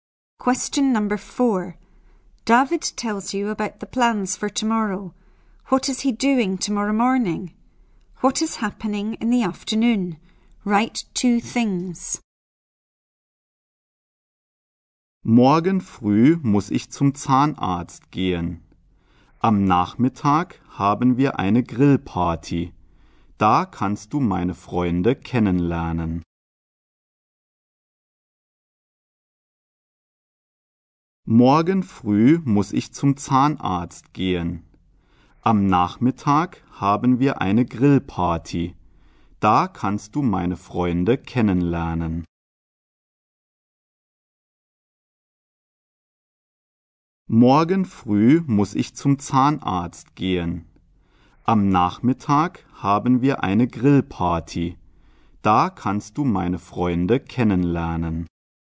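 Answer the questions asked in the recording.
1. Going to the dentist
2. A barbecue; you can meet his friends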